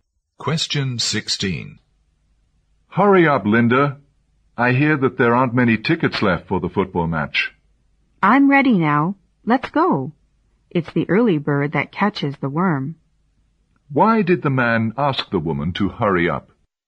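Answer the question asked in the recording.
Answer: There aren't many tickets left for the football match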